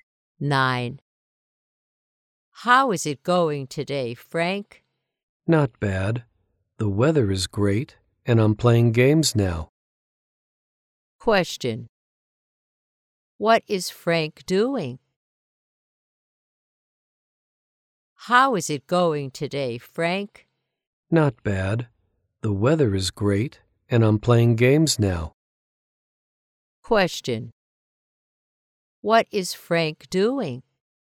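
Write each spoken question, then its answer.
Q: What is Frank doing?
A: Playing games.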